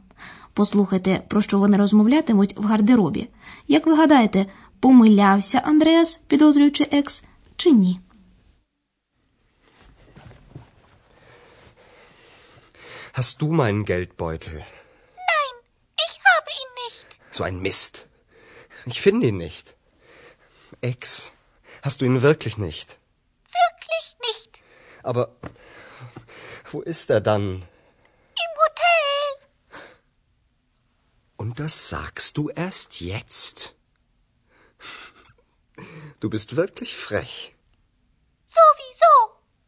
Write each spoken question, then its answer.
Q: Як ви гадаєте, помилявся Андреас, підозрюючи екс, чи ні?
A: Отже, хоча Екс і не мала ніякого відношення до зникнення гаманця, але з самого початку їй було відомо, що Андреас залишив його в готелі.